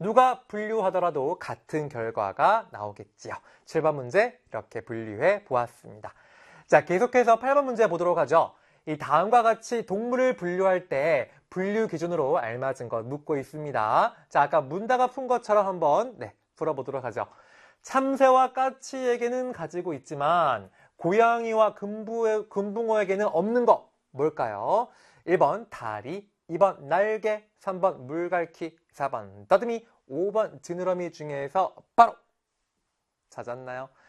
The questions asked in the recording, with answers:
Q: 참새와 까치에게는 가지고 있지만 고양이와 금붕어에게는 없는 것 뭘까요?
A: 정답 2번이네요.